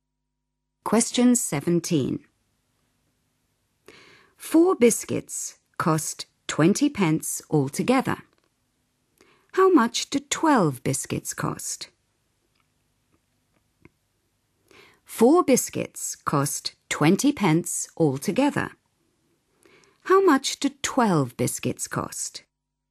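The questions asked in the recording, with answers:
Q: How much do 12 biscuits cost?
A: 60 pence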